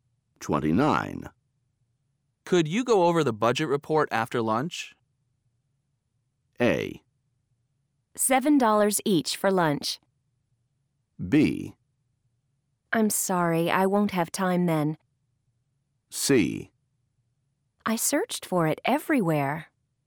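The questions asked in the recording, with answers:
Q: Could you go over the budget report after lunch?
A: B: I'm sorry, I won't have time then.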